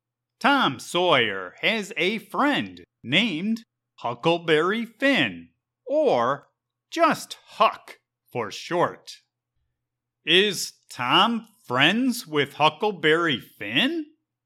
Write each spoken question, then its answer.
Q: Is Tom friends with Huckleberry Finn?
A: Yep. Tom is a friend of Huck.